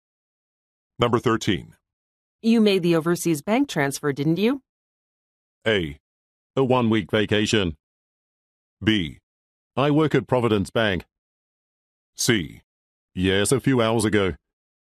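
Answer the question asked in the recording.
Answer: C: Yes, a few hours ago.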